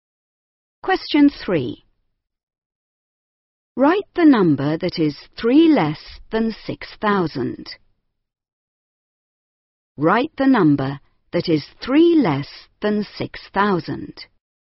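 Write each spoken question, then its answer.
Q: Write the number that is 3 less than 6,000.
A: 5997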